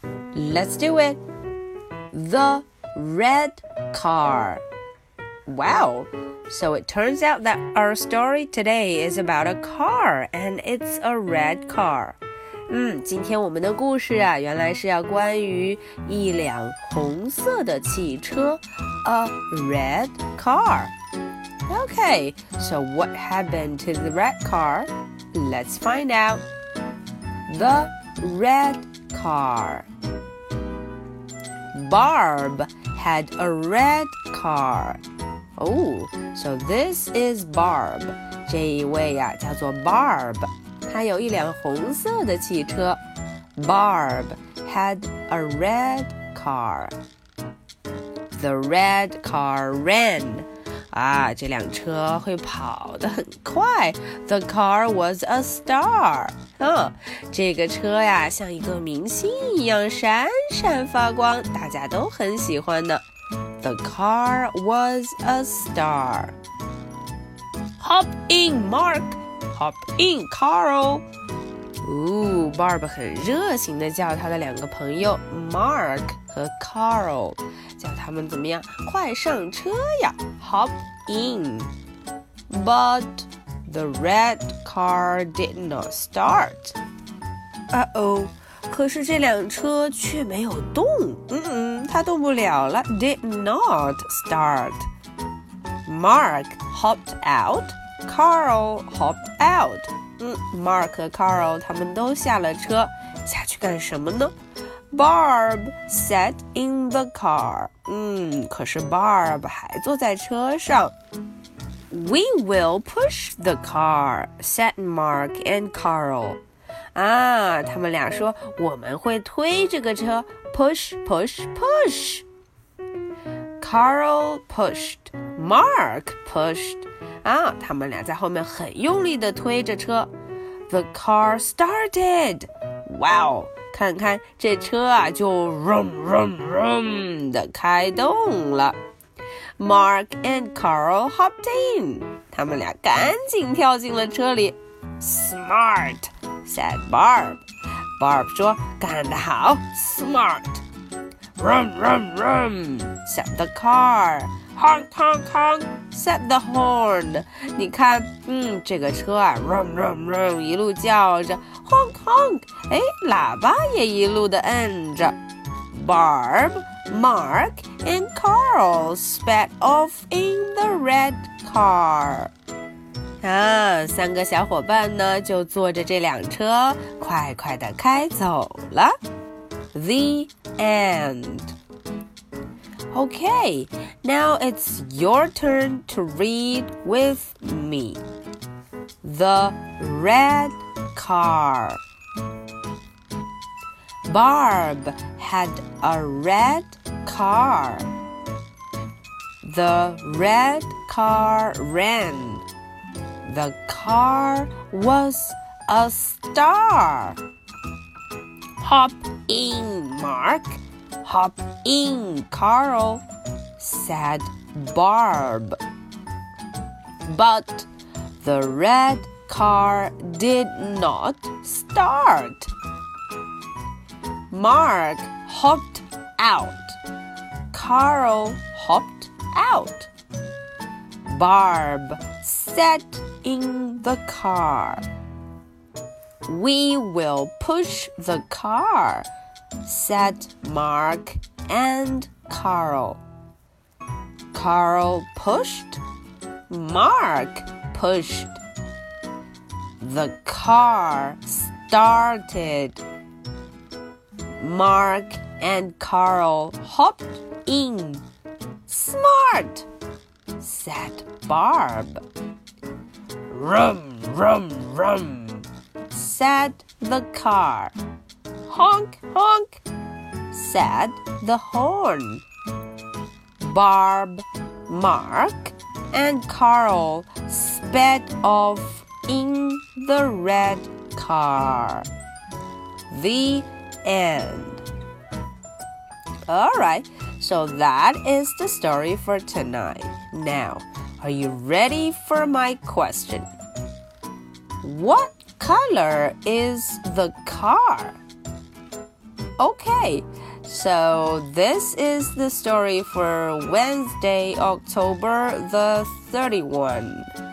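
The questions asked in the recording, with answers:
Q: What color is the car?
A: Red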